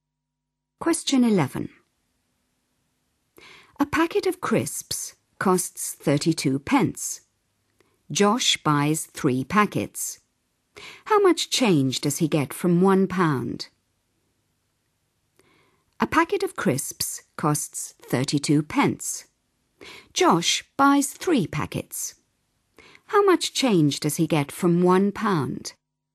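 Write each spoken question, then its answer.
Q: Josh buys 3 packets. How much change does he get from £1?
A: 4 pence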